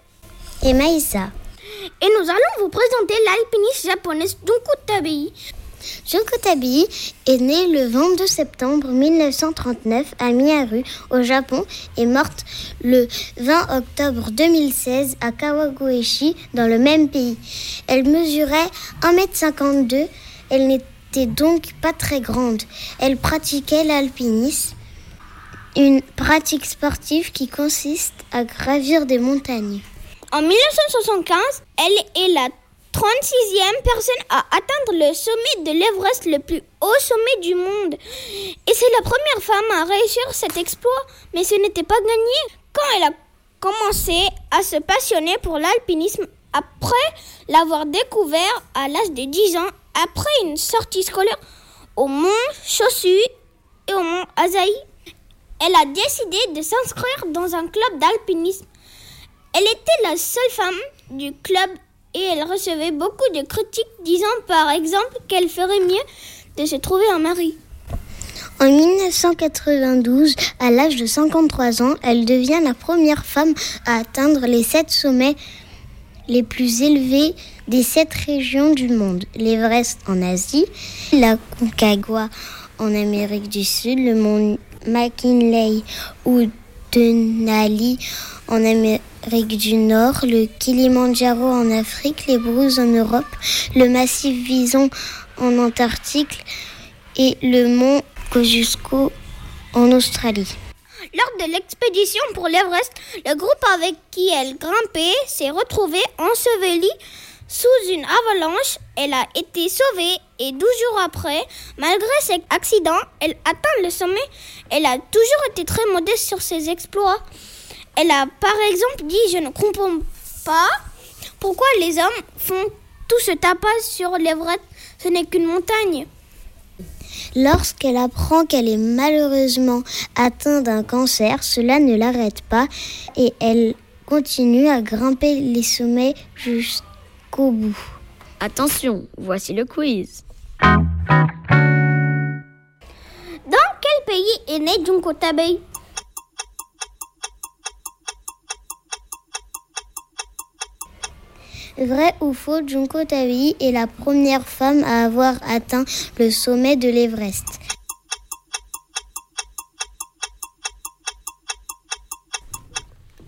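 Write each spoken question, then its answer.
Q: Dans quel pays est née Junko Tabei?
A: Au Japon

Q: Vrai ou faux, Junko Tabei est la première femme à avoir atteint le sommet de l'Everest.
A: Vrai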